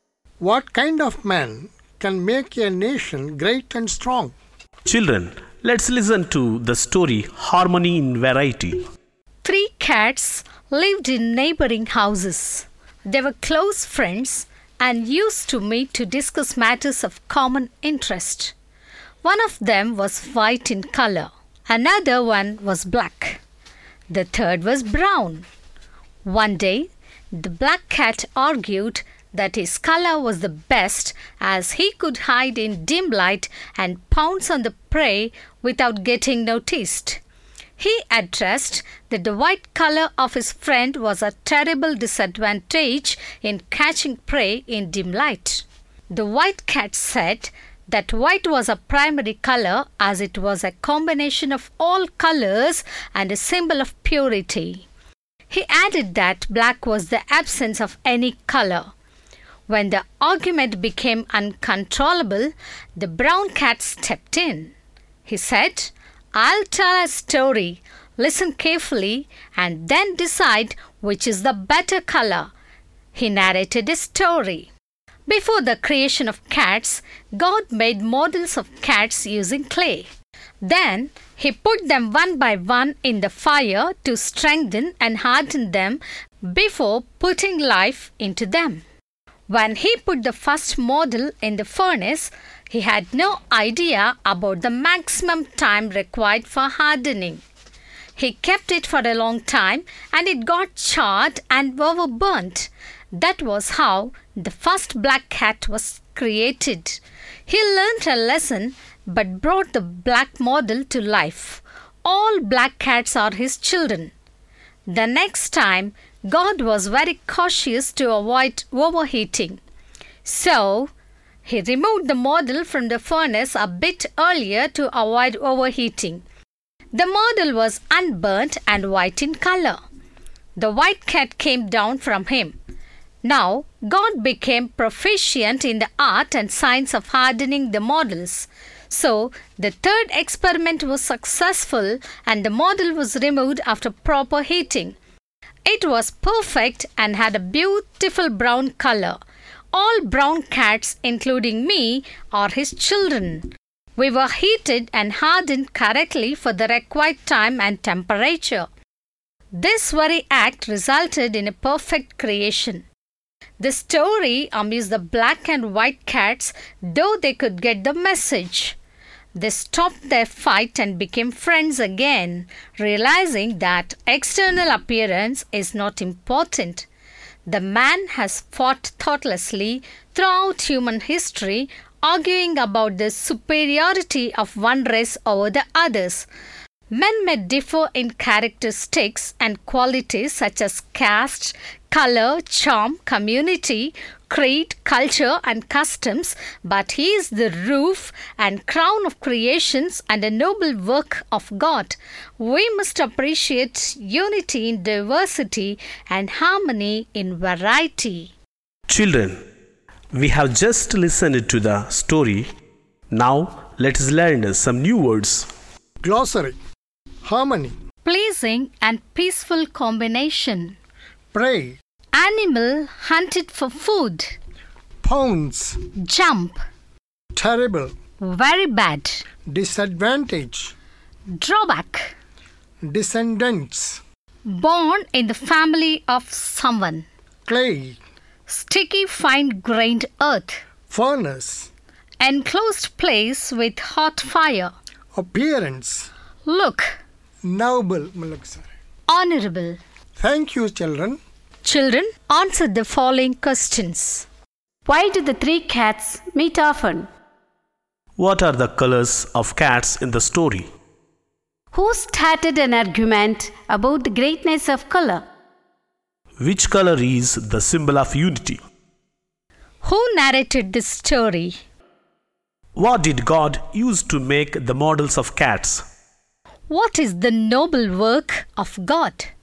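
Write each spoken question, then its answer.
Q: Why do the three cats meet often?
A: They were close friends and met to discuss matters of common interest

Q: What are the colors of cats in the story?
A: White, black and brown

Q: Who started an argument about the greatness of color?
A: The black cat

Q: Who narrated this story?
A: The brown cat

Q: What did God use to make the models of cats?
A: Clay

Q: What is the noble work of God?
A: Man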